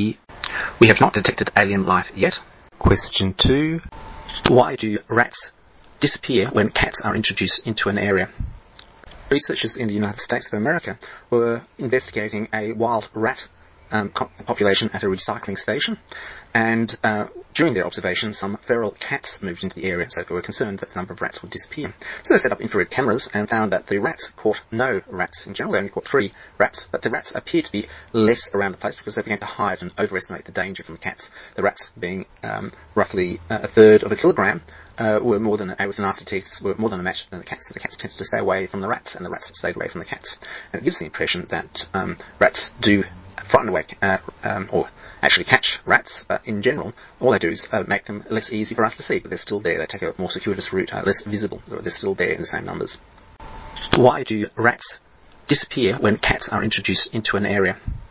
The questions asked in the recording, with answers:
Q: Why do rats disappear when cats are introduced into an area?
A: Rats hide from the cats.